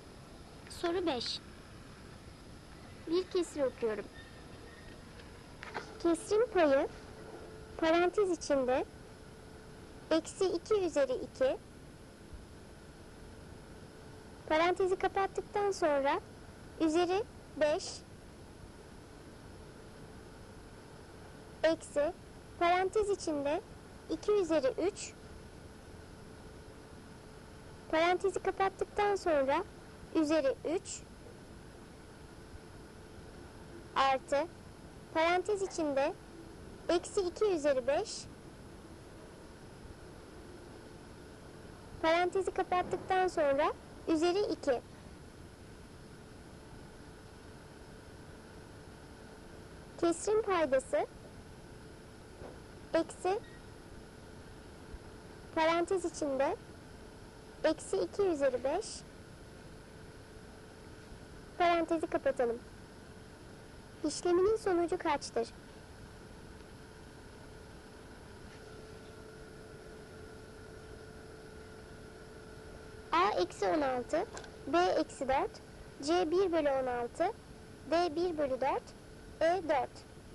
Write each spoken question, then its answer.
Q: parantezi kapatalım. İşleminin sonucu kaçtır?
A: Doğru cevap A eksi 16.